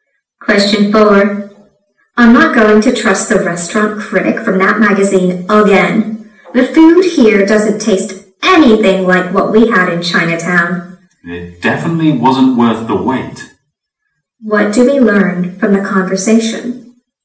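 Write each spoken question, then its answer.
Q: What do we learn from the conversation?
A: The restaurant was disappointing and not as good as the critic said.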